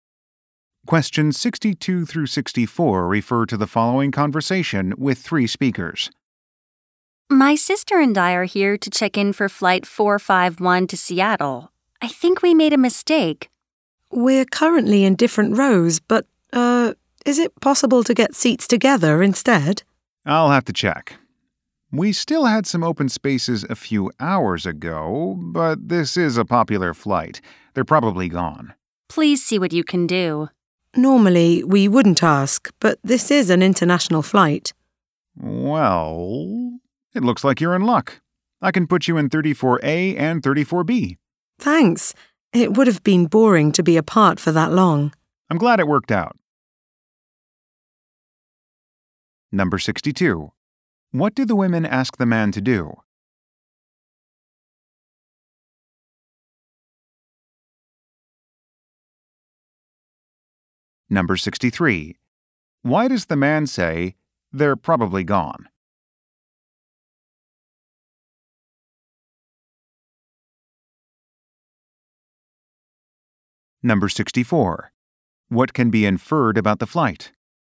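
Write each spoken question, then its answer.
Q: What do the women ask the man to do?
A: Give them seats together

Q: Why does the man say, "They're probably gone"?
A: The open seats were likely taken because the flight is popular

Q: What can be inferred about the flight?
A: It is a long international flight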